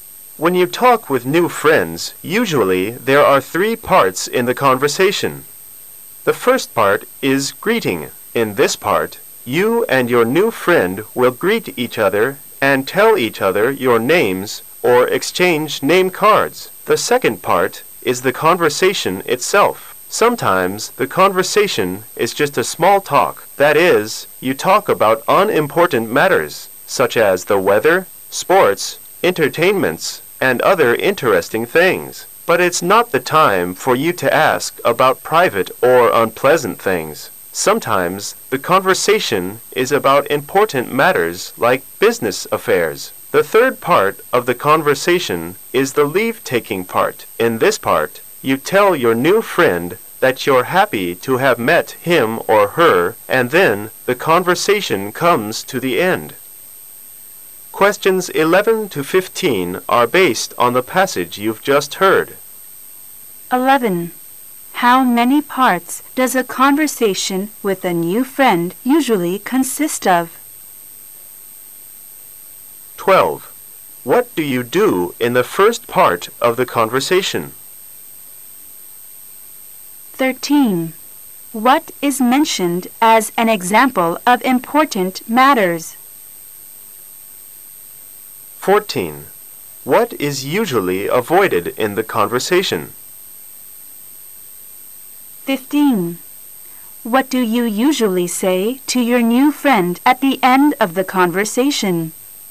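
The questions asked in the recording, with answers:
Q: How many parts does a conversation with a new friend usually consist of?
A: Three

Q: What do you do in the first part of the conversation?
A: Greet each other and tell each other your names or exchange name cards

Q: What is mentioned as an example of important matters?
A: Business affairs

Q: What is usually avoided in the conversation?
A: Private or unpleasant things

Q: What do you usually say to your new friend at the end of the conversation?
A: That you're happy to have met him or her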